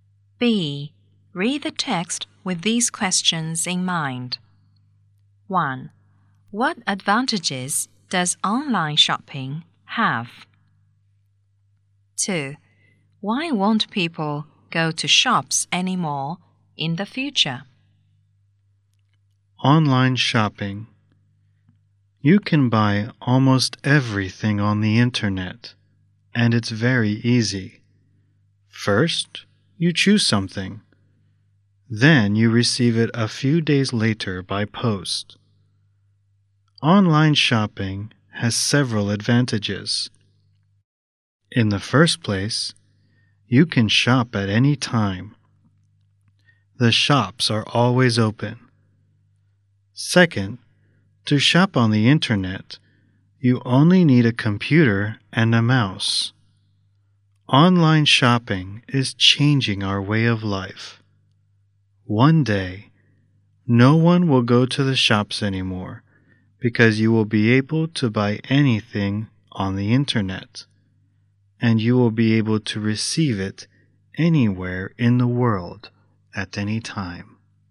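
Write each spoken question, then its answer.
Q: What advantages does online shopping have?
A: You can shop at any time because the shops are always open, and you only need a computer and a mouse.

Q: Why won't people go to shops anymore in the future?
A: Because they will be able to buy anything on the internet and receive it anywhere in the world at any time.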